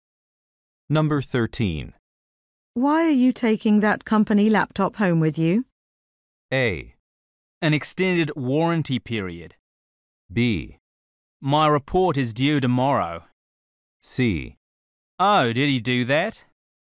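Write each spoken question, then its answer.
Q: Why are you taking that company laptop home with you?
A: B: My report is due tomorrow.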